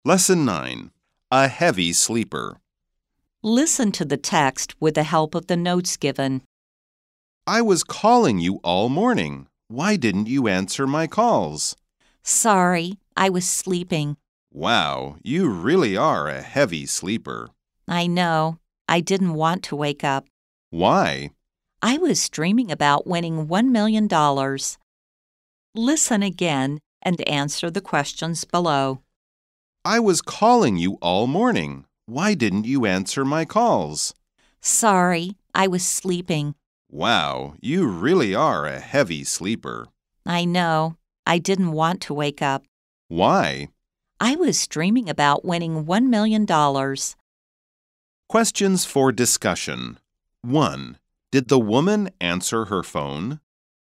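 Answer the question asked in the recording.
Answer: No, she was sleeping.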